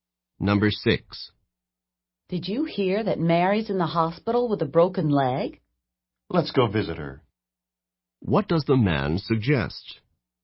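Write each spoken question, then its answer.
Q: What does the man suggest?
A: Visiting Mary in the hospital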